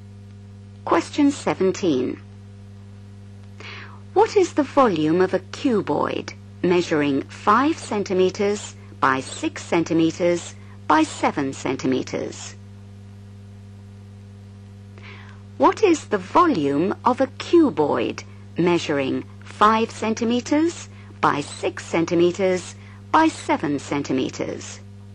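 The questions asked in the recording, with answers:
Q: What is the volume of a cuboid measuring 5 centimetres by 6 centimetres by 7 centimetres?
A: 210 cm3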